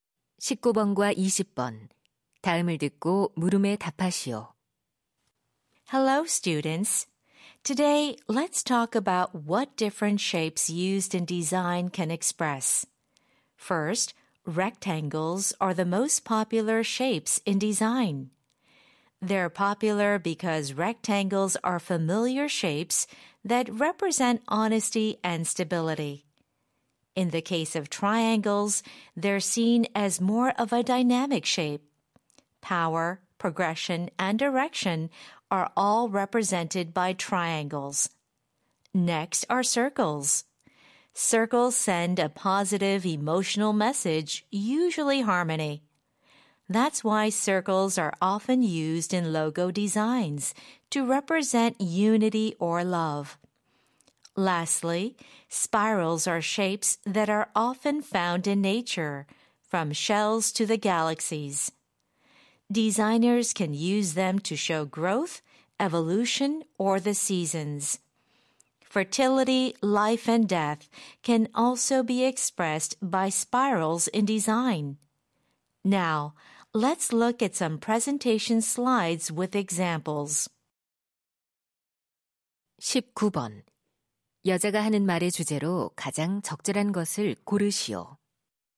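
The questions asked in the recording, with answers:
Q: 여자가 하는 말의 주제로 가장 적절한 것을 고르시오.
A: 디자인에 쓰이는 여러 모양이 표현하는 의미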